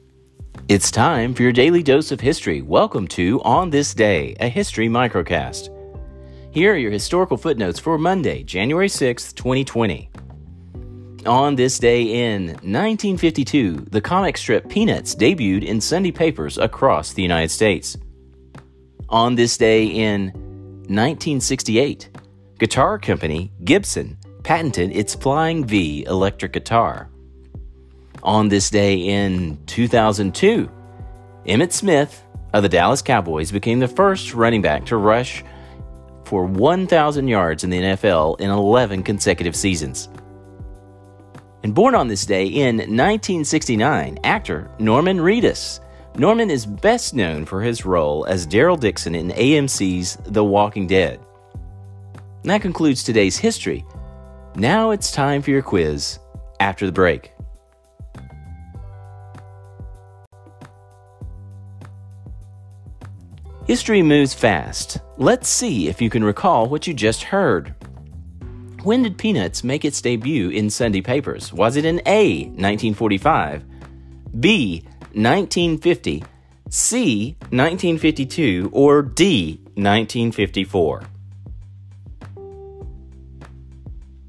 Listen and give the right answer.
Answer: Answer, C, 1952 was when Peanuts made its debut in Sunday papers.